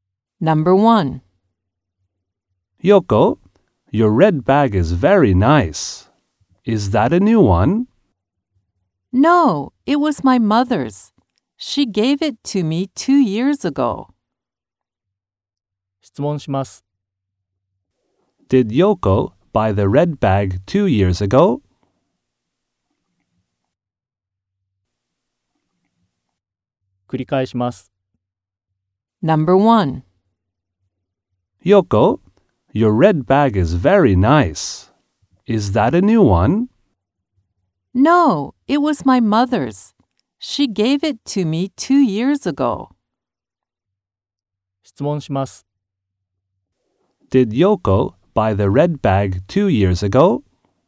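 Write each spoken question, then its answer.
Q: Did Yoko buy the red bag 2 years ago?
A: No, her mother gave it to her.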